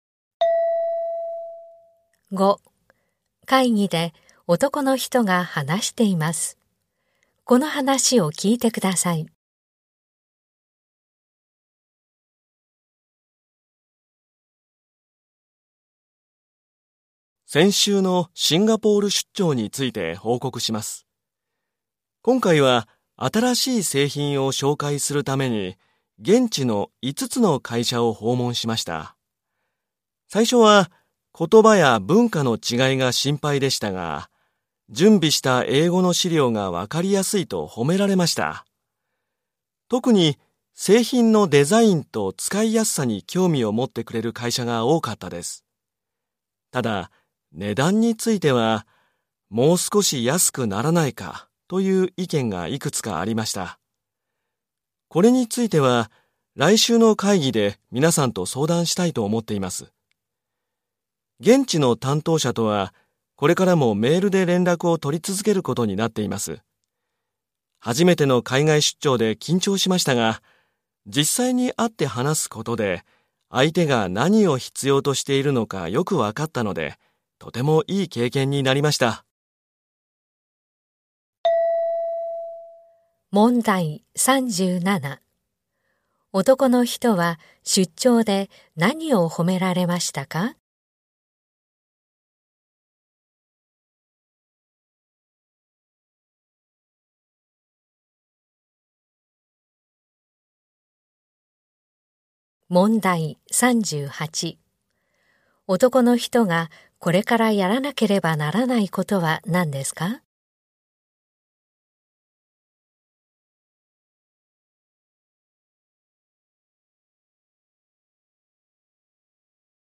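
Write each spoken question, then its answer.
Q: 男の人は出張で何を褒められましたか?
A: 準備した英語の資料がわかりやすいこと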